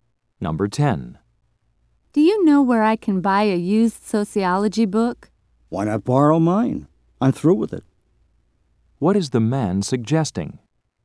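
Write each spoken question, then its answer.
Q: What is the man suggesting?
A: That the woman borrow his book.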